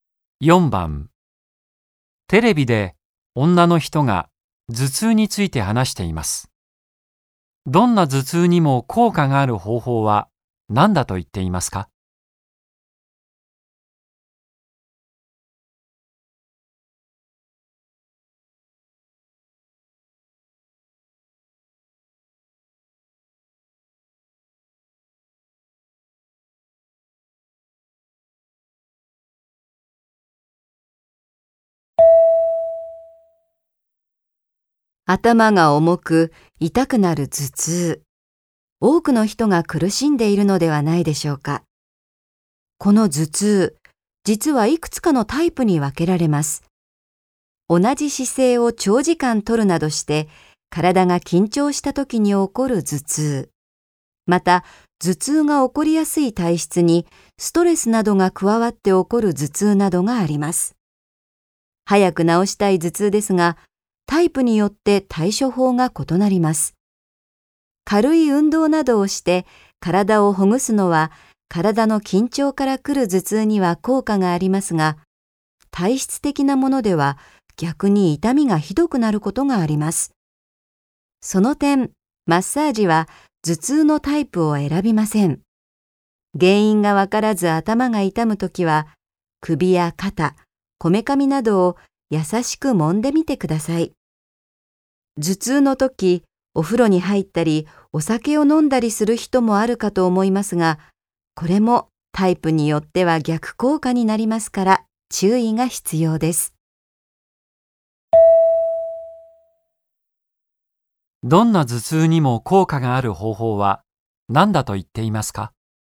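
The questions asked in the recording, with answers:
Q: どんな頭痛にも効果がある方法は何だと言っていますか?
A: マッサージ(首や肩、こめかみを優しく揉むこと)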